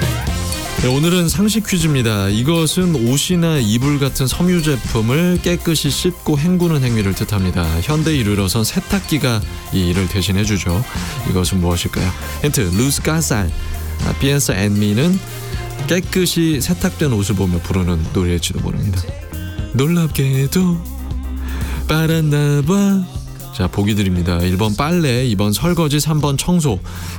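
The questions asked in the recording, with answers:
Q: 이것은 무엇일까요?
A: 1: 빨래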